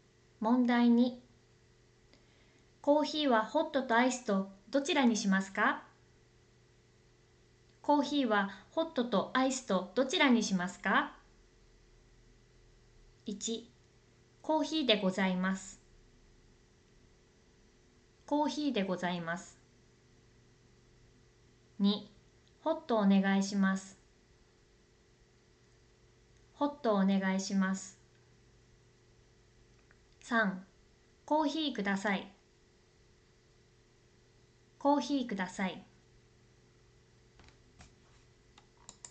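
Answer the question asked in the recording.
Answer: 2: ホットお願いします。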